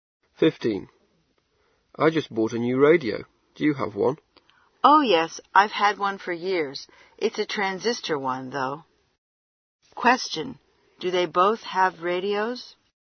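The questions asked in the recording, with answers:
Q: Do they both have radios?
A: Yes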